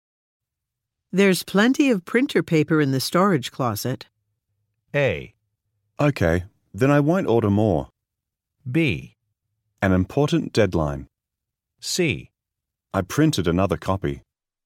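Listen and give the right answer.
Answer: A: Okay, then I won't order more.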